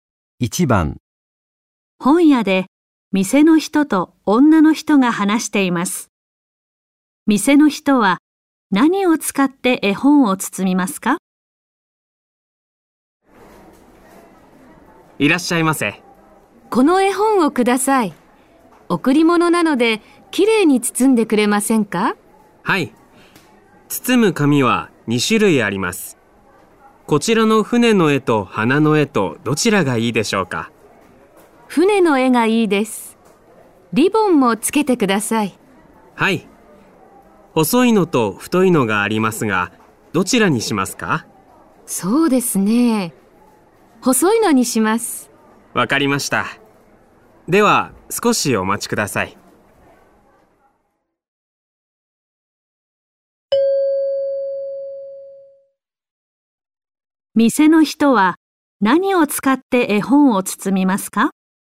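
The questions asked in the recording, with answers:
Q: 店の人は何を使って絵本を包みますか?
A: 船の絵の紙と細いリボン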